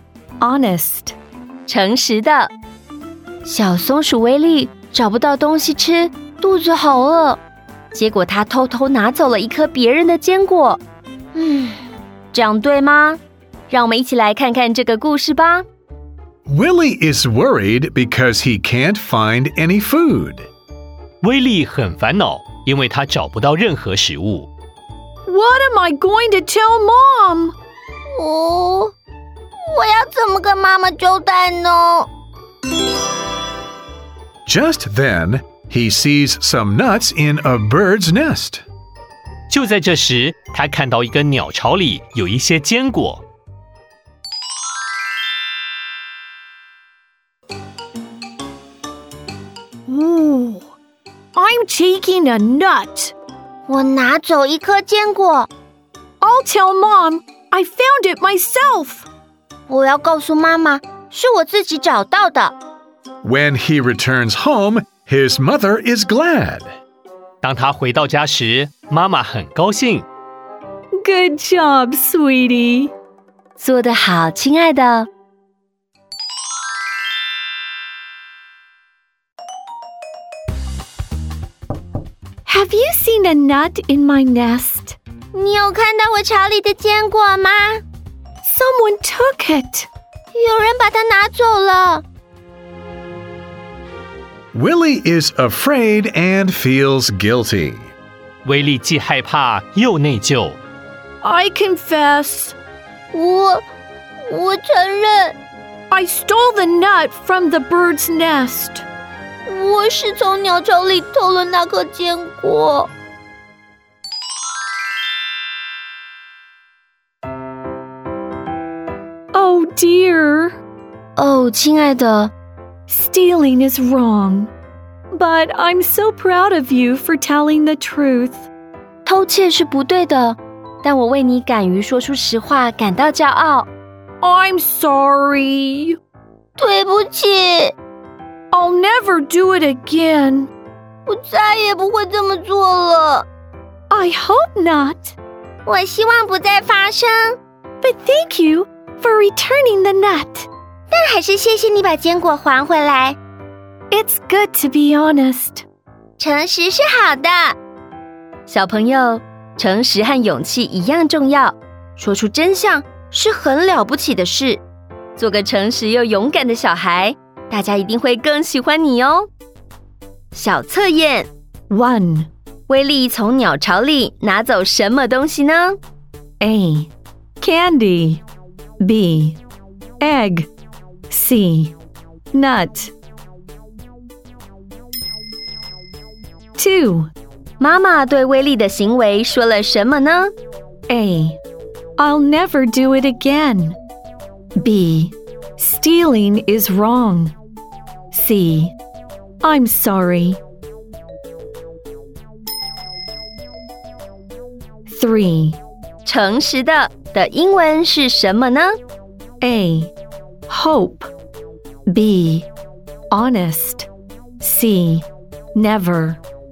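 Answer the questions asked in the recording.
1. C: Nut
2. B: Stealing is wrong.
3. B: Honest.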